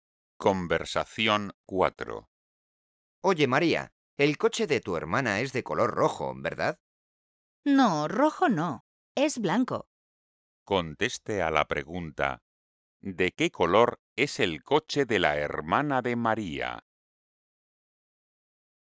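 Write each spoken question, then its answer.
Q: ¿de qué color es el coche de la hermana de María?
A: blanco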